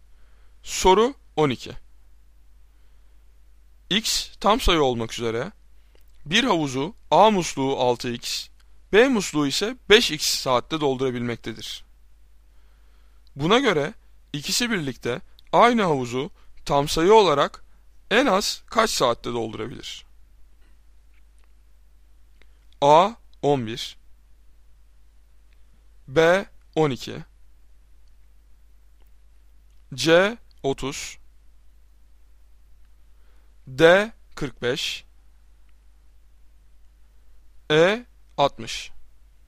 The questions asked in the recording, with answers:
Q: Buna göre ikisi birlikte aynı havuzu tam sayı olarak en az kaç saatte doldurabilir?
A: Doğru cevap C 30.